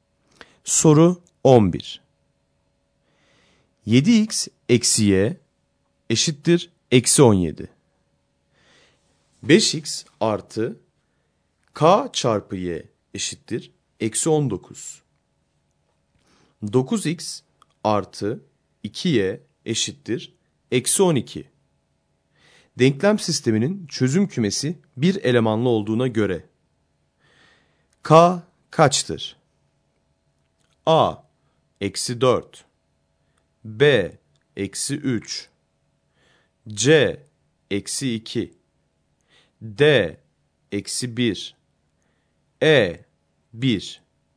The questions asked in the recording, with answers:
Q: Denklem sisteminin çözüm kümesi bir elemanlı olduğuna göre k kaçtır?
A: Doğru yanıt B şıkkı.